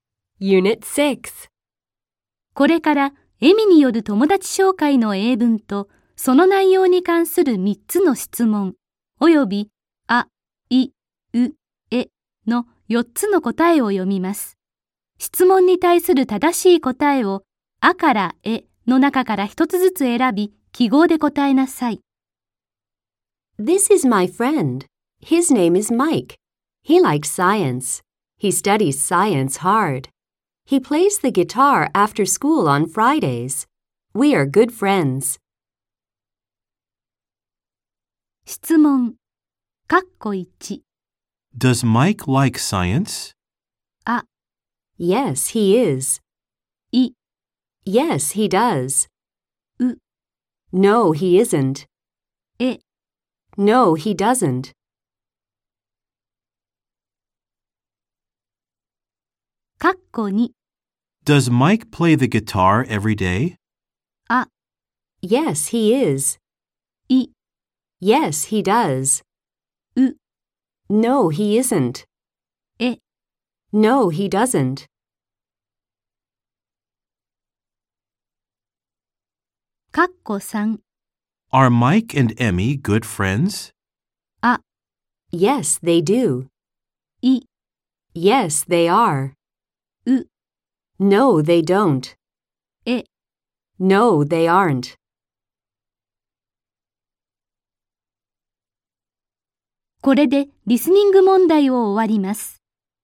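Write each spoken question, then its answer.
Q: Does Mike like science?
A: い: Yes, he does.

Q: Does Mike play the guitar every day?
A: え: No, he doesn't.

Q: Are Mike and Emmy good friends?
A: い: Yes, they are.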